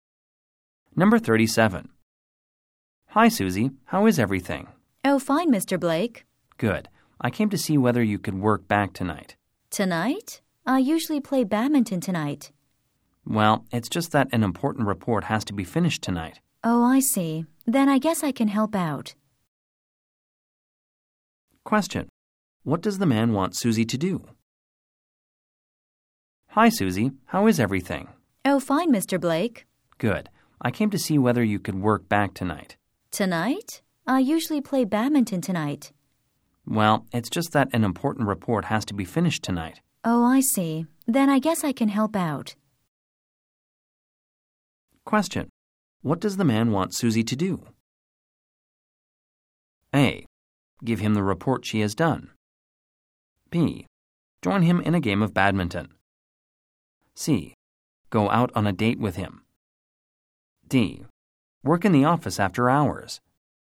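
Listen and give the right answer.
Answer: D: Work in the office after hours.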